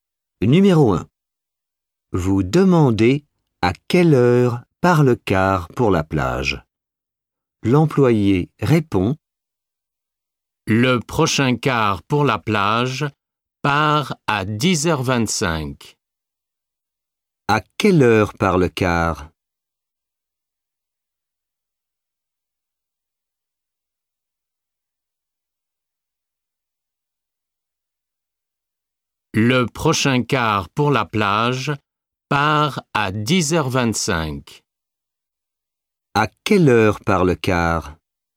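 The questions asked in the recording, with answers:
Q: À quelle heure part le car?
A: À 10h25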